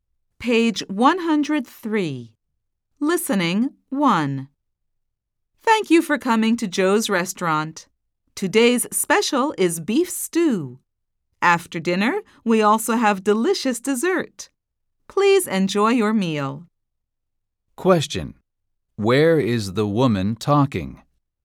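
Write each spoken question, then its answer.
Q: Where is the woman talking?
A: At Joe's restaurant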